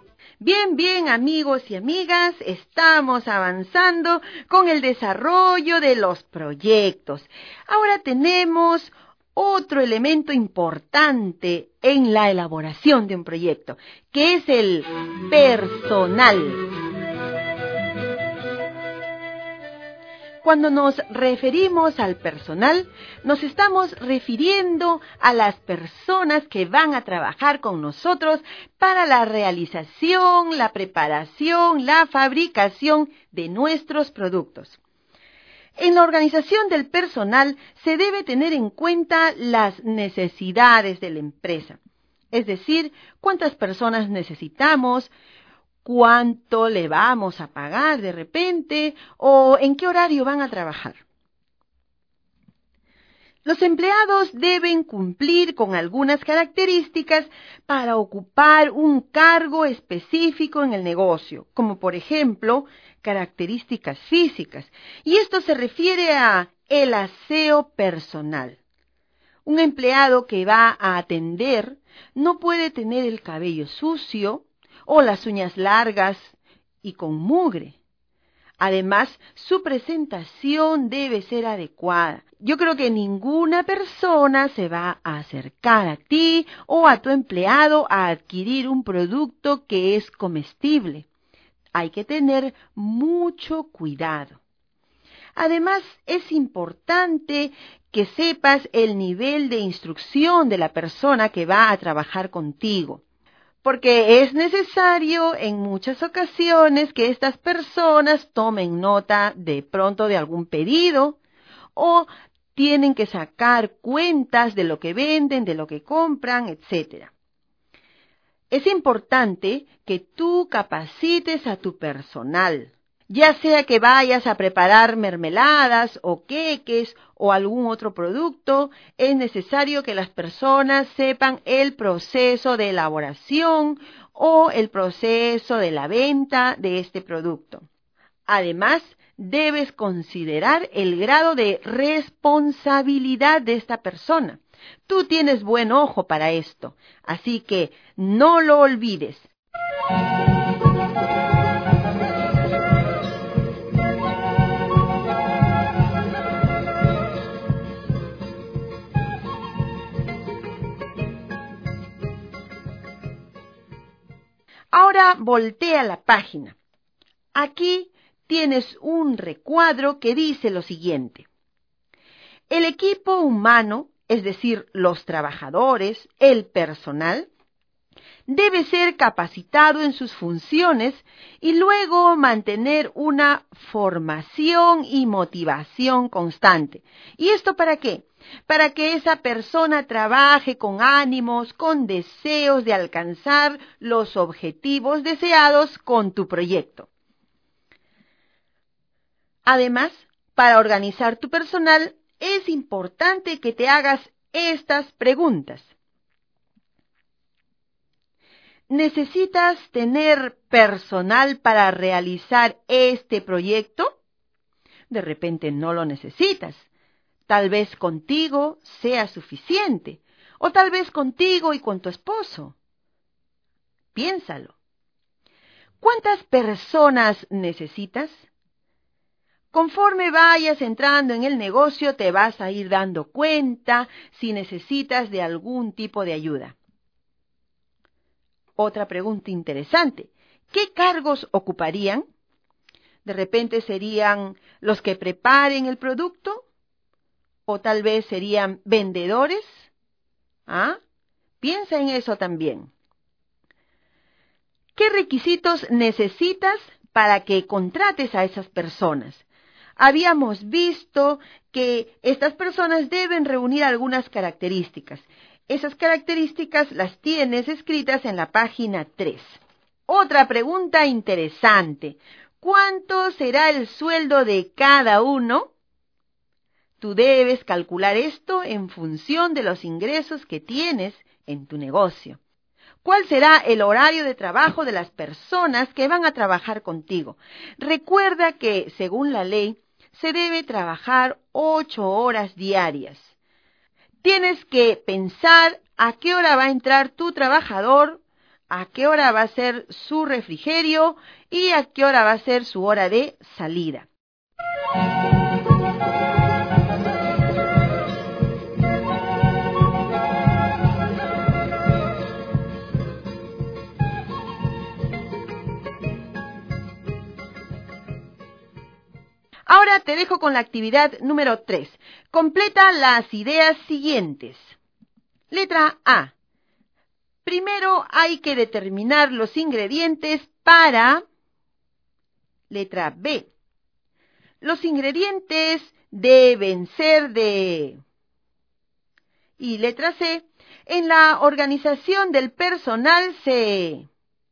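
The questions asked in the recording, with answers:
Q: Y letra C. En la organización del personal se...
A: debe tener en cuenta las necesidades de la empresa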